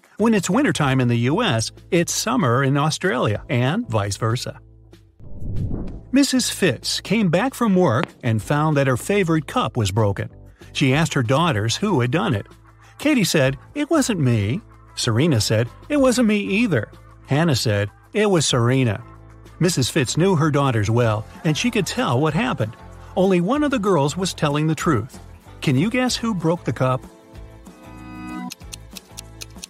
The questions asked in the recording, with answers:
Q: Can you guess who broke the cup?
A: So Serena is the honest girl and Katie is the guilty one.